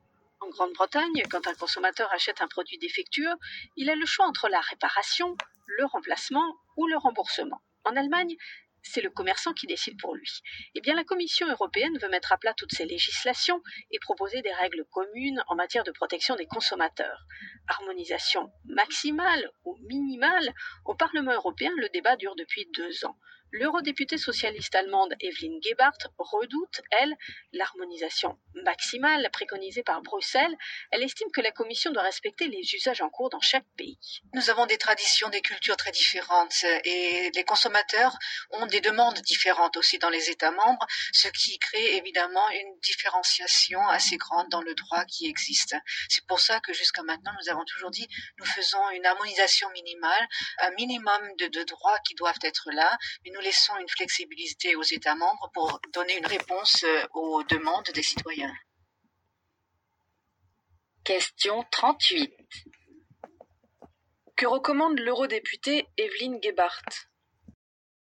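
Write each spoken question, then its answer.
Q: Que recommande l'eurodéputée Evelyn Gebhardt ?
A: Une harmonisation minimale : un minimum de droits communs, avec de la flexibilité pour les États membres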